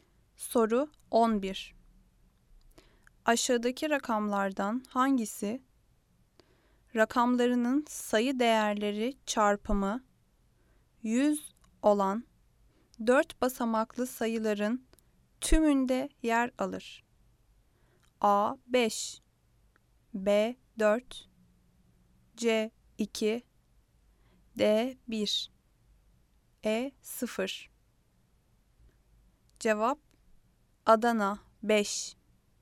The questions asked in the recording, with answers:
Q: Aşağıdaki rakamlardan hangisi rakamlarının sayı değerleri çarpımı 100 olan 4 basamaklı sayıların tümünde yer alır?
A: Cevap Adana 5